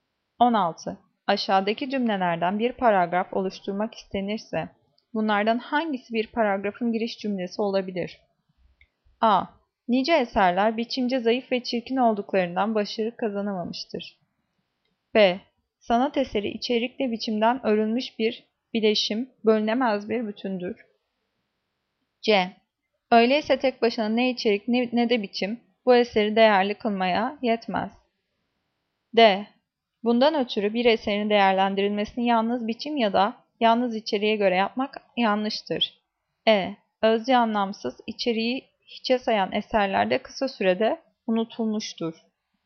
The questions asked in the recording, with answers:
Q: Aşağıdaki cümlelerden bir paragraf oluşturmak istenirse, bunlardan hangisi bir paragrafın giriş cümlesi olabilir?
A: Cevap B. Sanat eseri içerikle biçimden örülmüş bir bileşim, bölünemez bir bütündür.